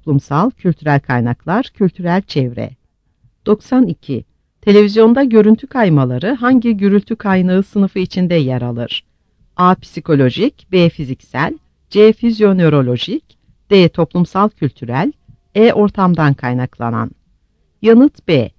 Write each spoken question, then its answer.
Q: Televizyonda görüntü kaymaları hangi gürültü kaynağı sınıfı içinde yer alır?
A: Yanıt B.